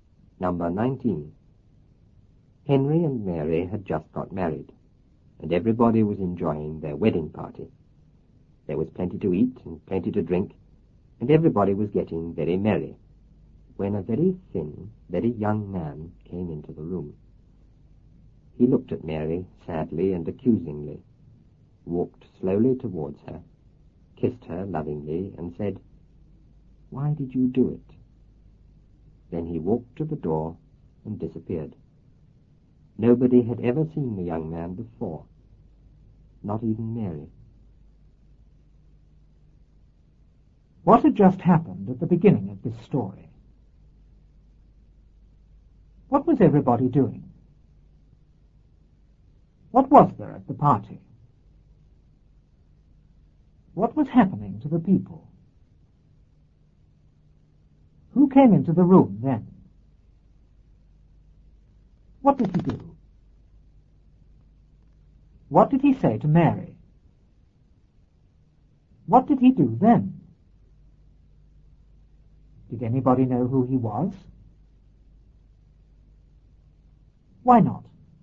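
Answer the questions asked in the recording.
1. Henry and Mary had just got married.
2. Enjoying the wedding party.
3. Plenty to eat and plenty to drink.
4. They were getting very merry.
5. A very thin, very young man.
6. He looked at Mary sadly, walked towards her and kissed her.
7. "Why did you do it?" Then he walked to the door and disappeared.
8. No, nobody had ever seen him before.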